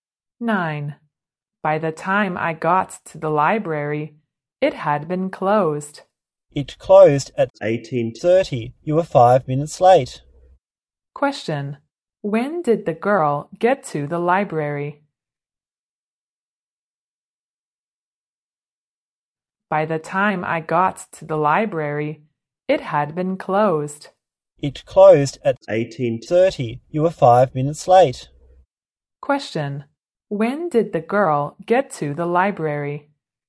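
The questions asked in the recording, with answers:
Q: When did the girl get to the library?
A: At 18:35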